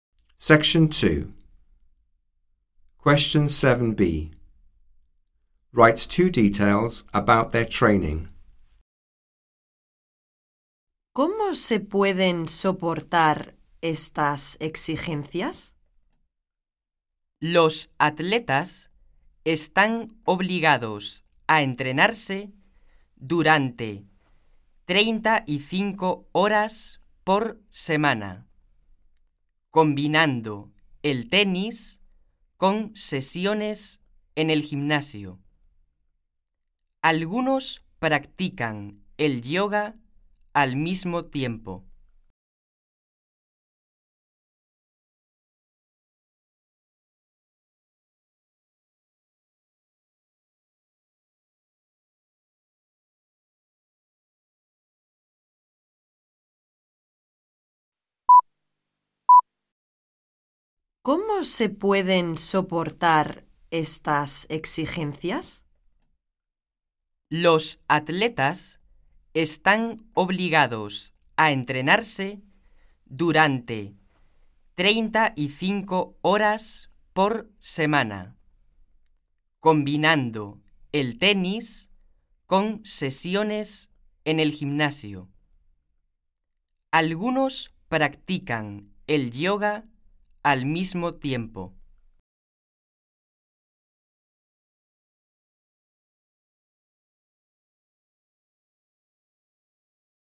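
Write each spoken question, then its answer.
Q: Write 2 details about their training.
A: 35 hours a week, combining tennis with gym sessions; some do yoga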